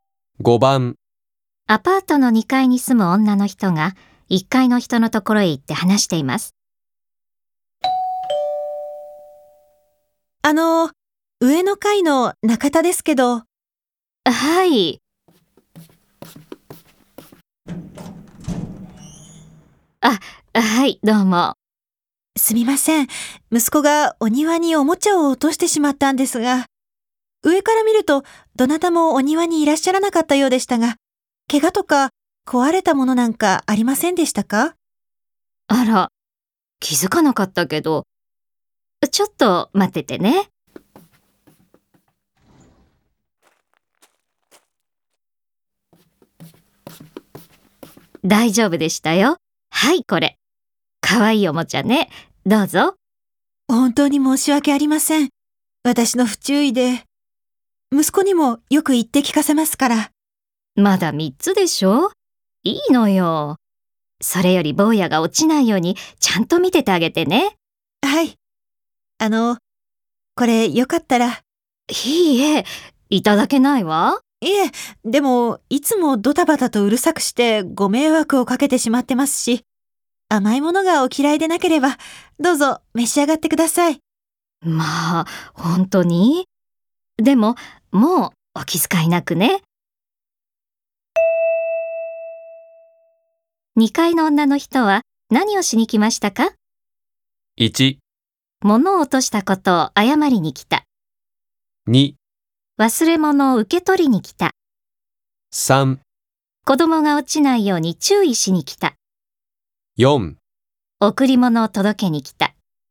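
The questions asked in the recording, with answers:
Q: 2階の女の人は何をしに来ましたか?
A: 1: 物を落としたことを謝りに来た。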